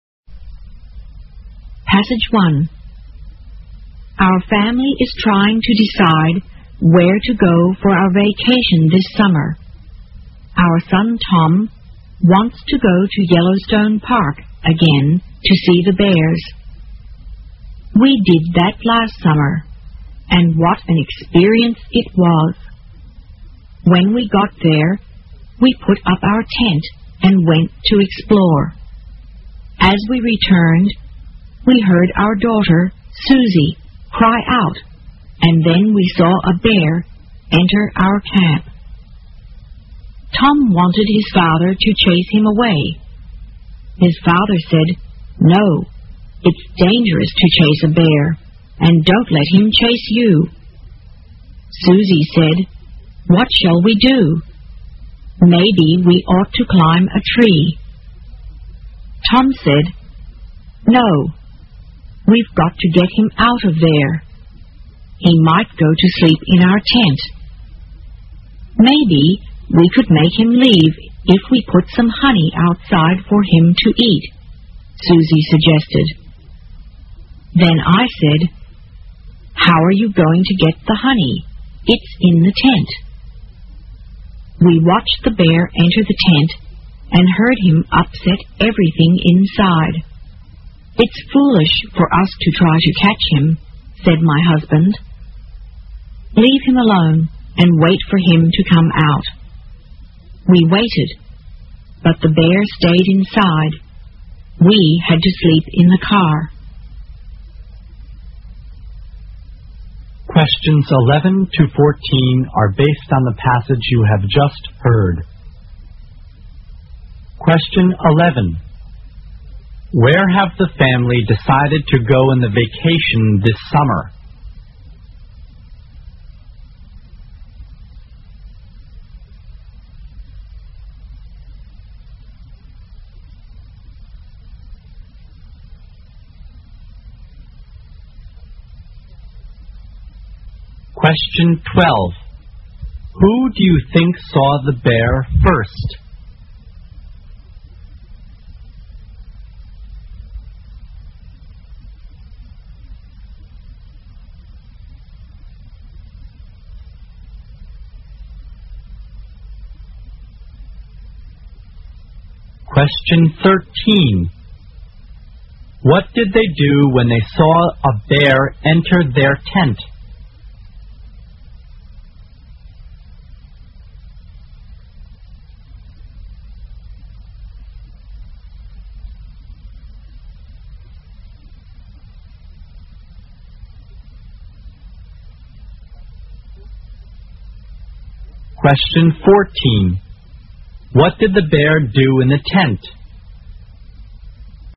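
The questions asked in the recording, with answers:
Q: Who do you think saw the bear first?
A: Susie

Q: What did they do when they saw a bear enter their tent?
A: They left it alone and waited for it to come out

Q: What did the bear do in the tent?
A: It upset everything inside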